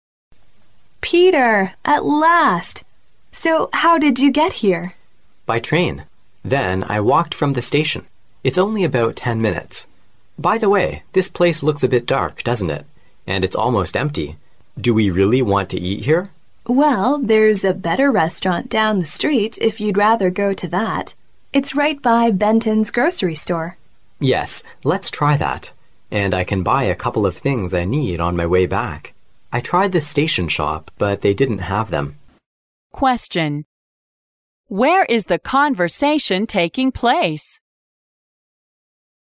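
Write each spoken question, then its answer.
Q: Question. Where is the conversation taking place?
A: In a restaurant

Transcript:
[听力原文] W: Peter, at last! So how did you get here? M: By train. Then I walked from the station. It's only about ten minutes. By the way, this place looks a bit dark, doesn't it? And it's almost empty. Do you really want to eat here? W: Well, there is a better restaurant down the street if you'd rather go to that. It is right by Benton's Grocery store. M: Yes, let's try that. And I can buy a couple of things I need on my way back. I tried the station shop, but they didn't have them.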